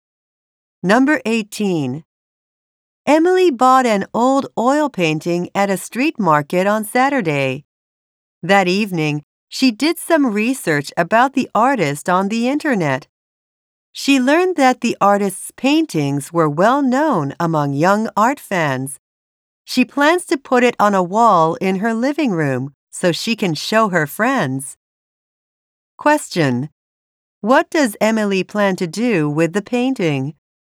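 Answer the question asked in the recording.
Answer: Put it on a wall in her living room to show her friends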